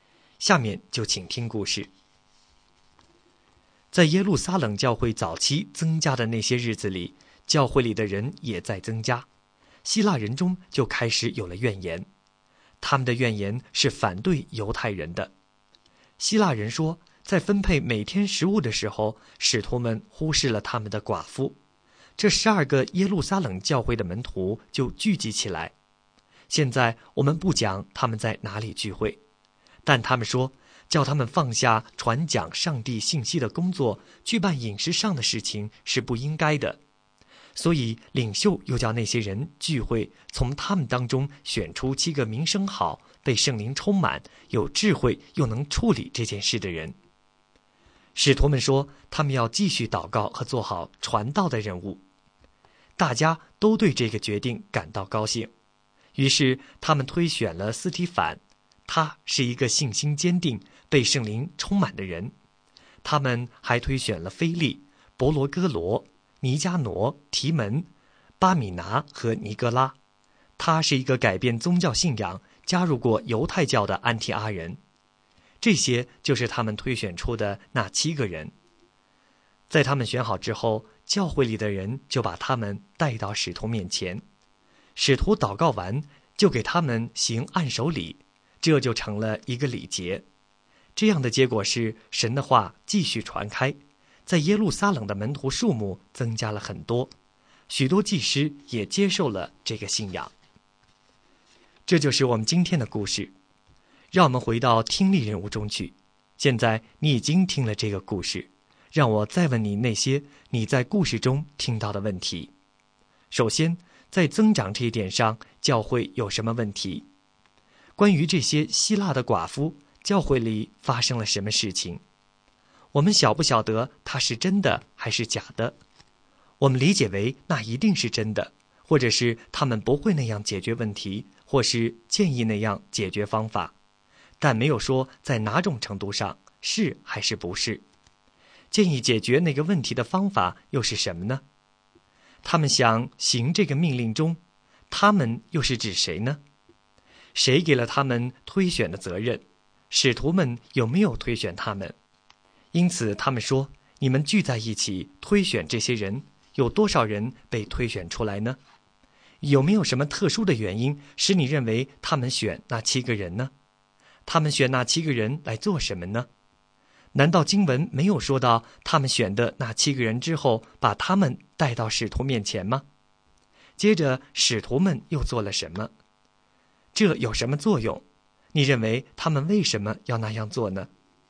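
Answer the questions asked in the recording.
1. 希腊人抱怨在每天分配食物时,他们的寡妇被忽视了
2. 七个人
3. 为他们祷告,并给他们行按手礼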